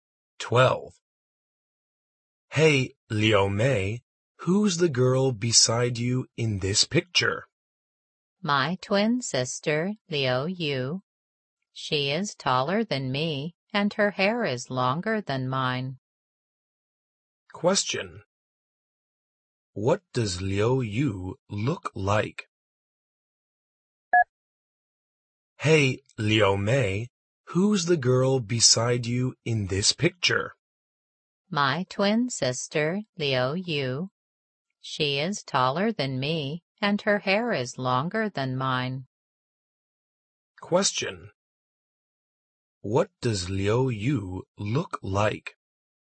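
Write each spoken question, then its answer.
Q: What does Liu Yu look like?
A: She is taller than Liu Mei and has longer hair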